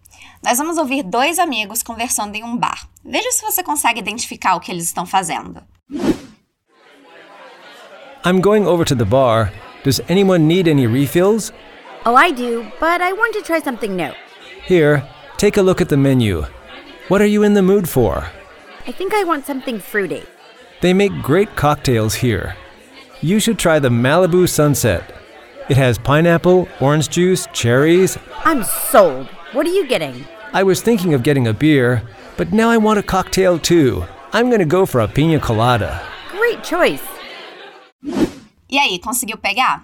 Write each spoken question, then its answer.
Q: Veja se você consegue identificar o que eles estão fazendo.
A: Eles estão escolhendo o que vão pedir para beber.